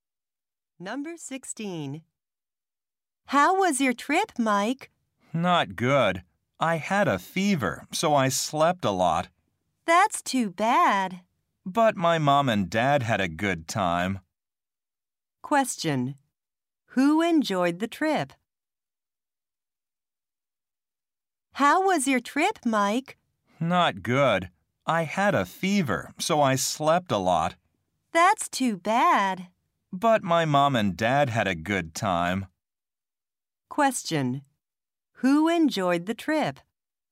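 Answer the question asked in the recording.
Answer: Mike's parents.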